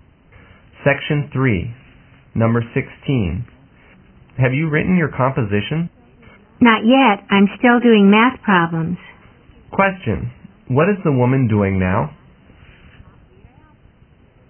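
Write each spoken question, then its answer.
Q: What is the woman doing now?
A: Doing math problems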